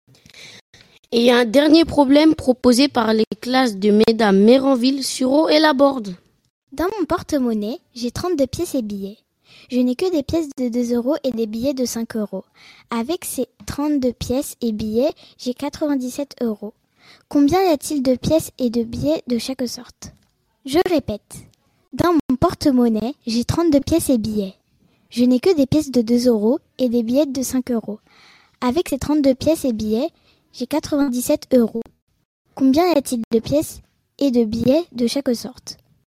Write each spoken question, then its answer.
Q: Combien y a-t-il de pièces et de billets de chaque sorte?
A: la réponse c'est 11 billets et 21 pièces.